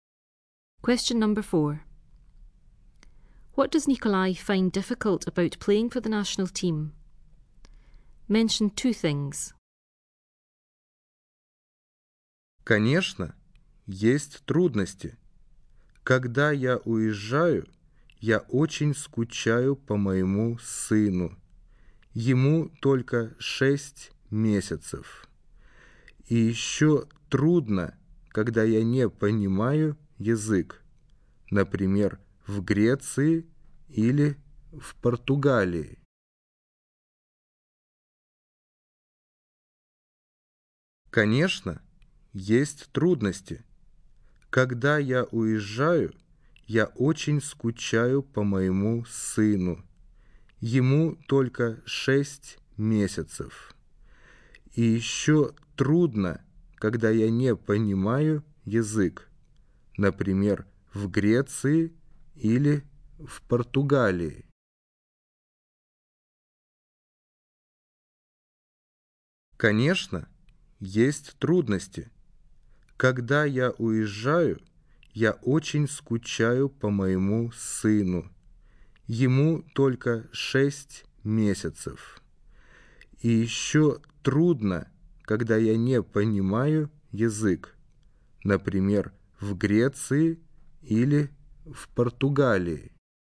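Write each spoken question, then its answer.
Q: What does Nikolai find difficult about playing for the national team?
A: He misses his six-month-old son; it is hard when he doesn't understand the language (e.g. in Greece or Portugal)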